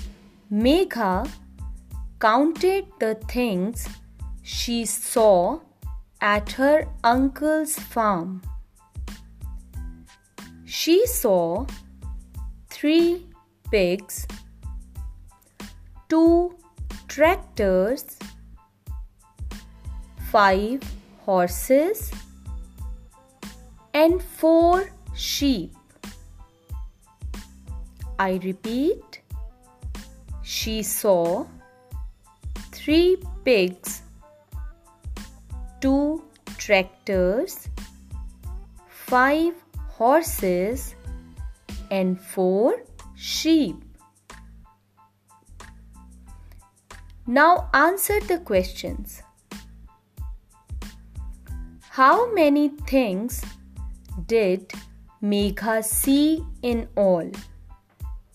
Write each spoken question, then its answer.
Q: How many things did Megha see in all?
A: She saw 14 things in all.